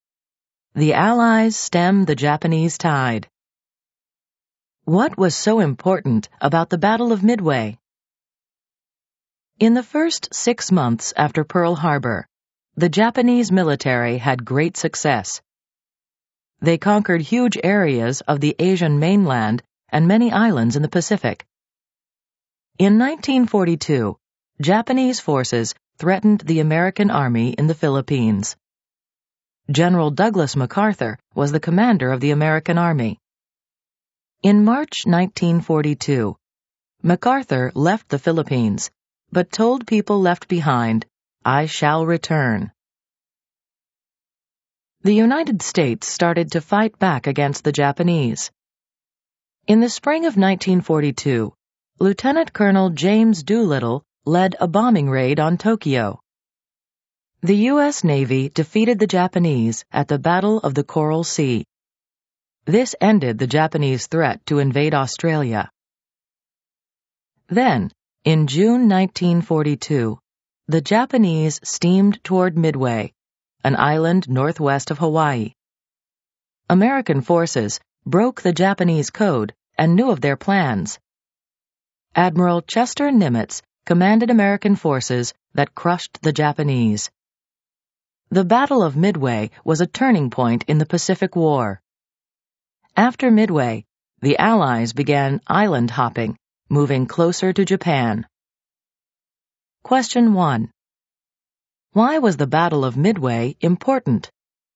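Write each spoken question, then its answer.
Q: Why was the Battle of Midway important?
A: It was a turning point in the Pacific War; after it the Allies began island hopping toward Japan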